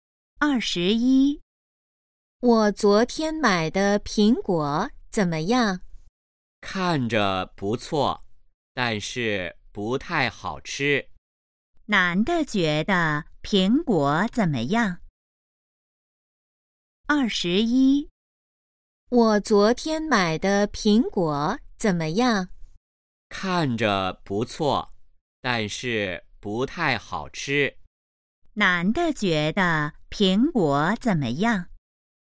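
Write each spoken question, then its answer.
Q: 男的觉得苹果怎么样?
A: 不太好吃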